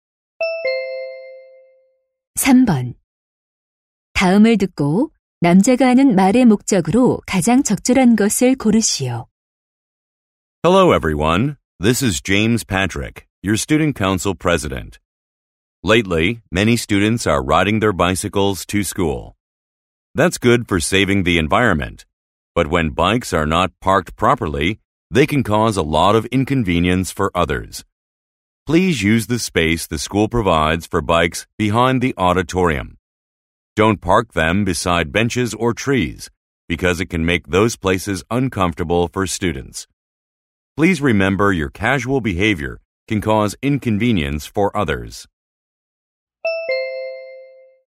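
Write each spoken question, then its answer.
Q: 다음을 듣고 남자가 하는 말의 목적으로 가장 적절한 것을 고르시오.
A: 자전거를 지정된 장소에 주차하도록 요청하려고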